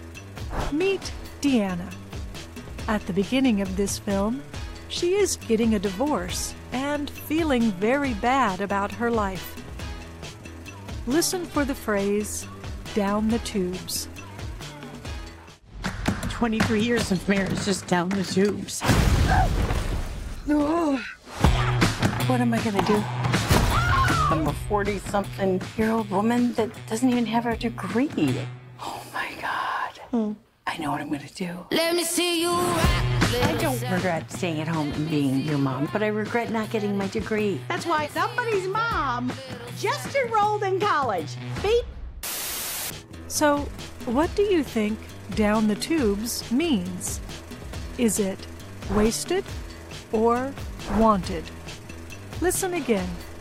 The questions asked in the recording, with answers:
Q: So, what do you think down the tubes means? Is it wasted or wanted?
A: Down the tubes means wasted.